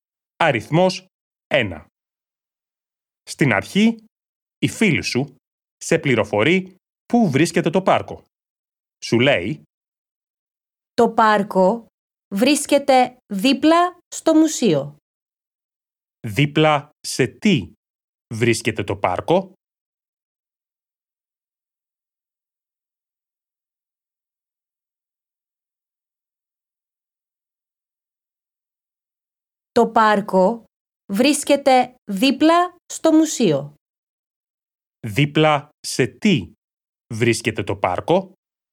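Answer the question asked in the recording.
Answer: Δίπλα στο μουσείο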